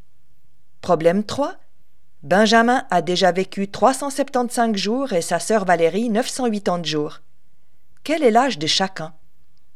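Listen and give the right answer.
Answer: Benjamin a 375 jours, Valérie 980 jours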